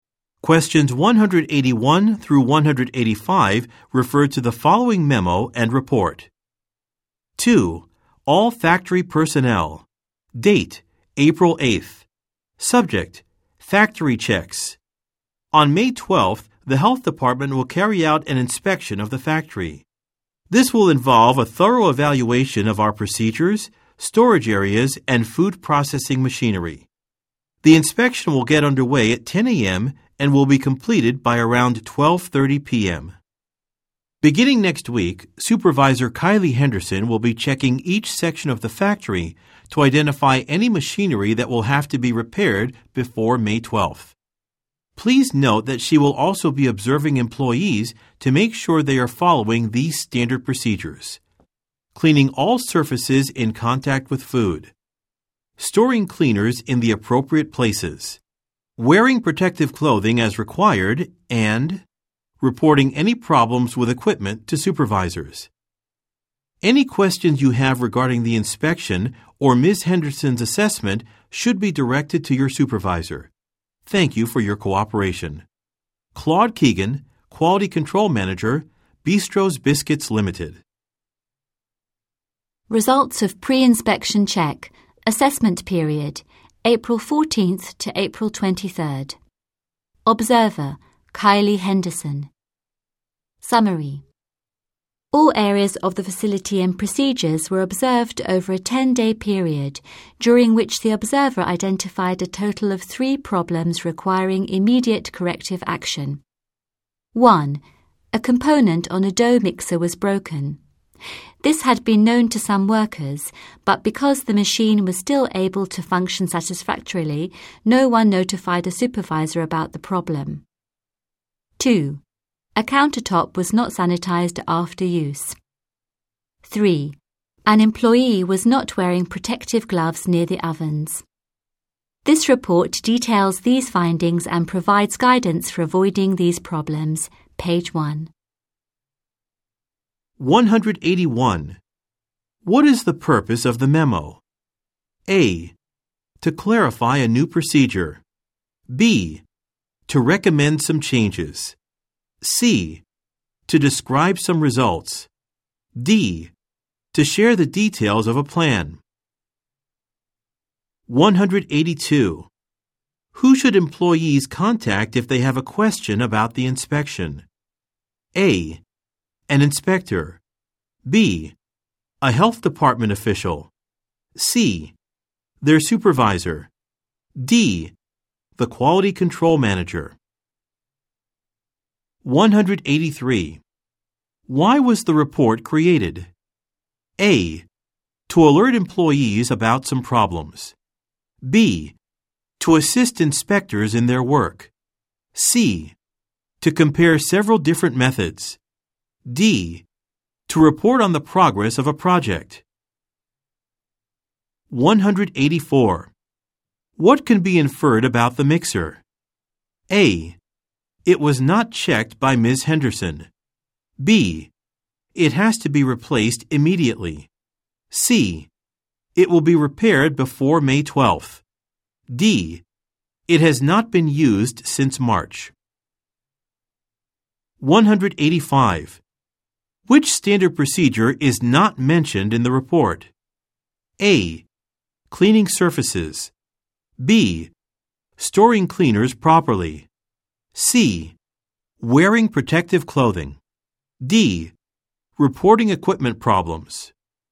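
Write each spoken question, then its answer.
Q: What is the purpose of the memo?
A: D: To share the details of a plan.

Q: Who should employees contact if they have a question about the inspection?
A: C: Their supervisor.

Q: What can be inferred about the mixer?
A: C: It will be repaired before May 12th.

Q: Which standard procedure is not mentioned in the report?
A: B: Storing cleaners properly.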